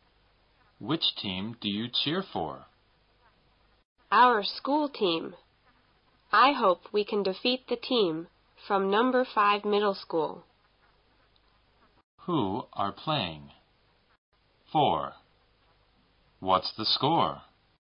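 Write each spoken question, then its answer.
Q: Who are playing?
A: Our school team and the team from number 5 middle school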